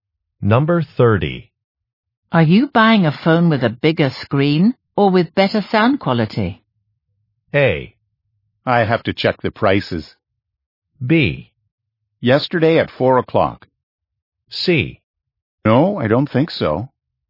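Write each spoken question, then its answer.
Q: Are you buying a phone with a bigger screen or with better sound quality?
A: A: I have to check the prices.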